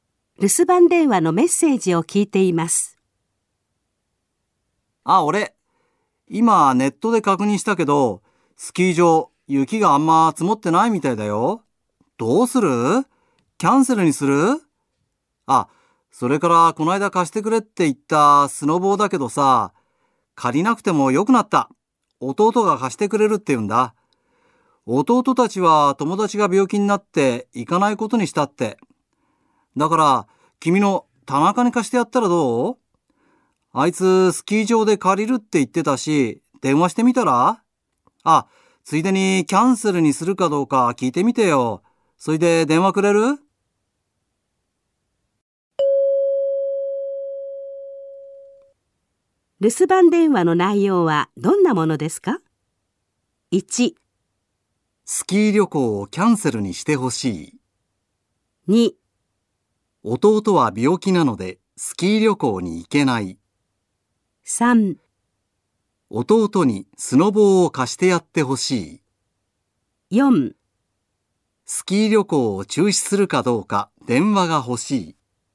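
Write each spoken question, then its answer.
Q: 留守番電話の内容はどんなものですか?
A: 4: スキー旅行を中止するかどうか電話が欲しい。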